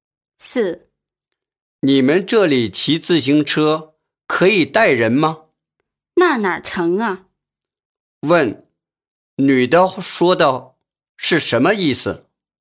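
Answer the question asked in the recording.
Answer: 骑自行车不能带人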